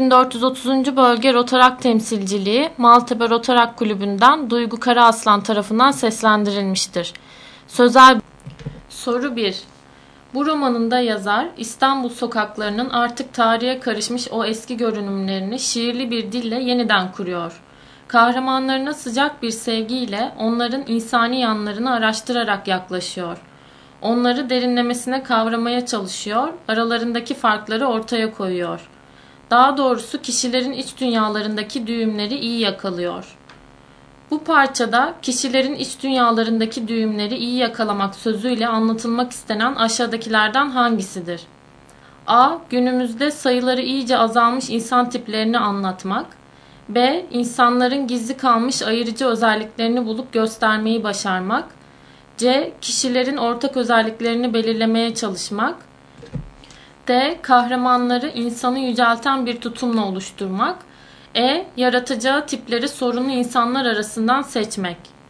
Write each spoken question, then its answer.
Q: Bu parçada kişilerin iç dünyalarındaki düğümleri iyi yakalamak sözüyle anlatılmak istenen aşağıdakilerden hangisidir?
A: Doğru cevap B.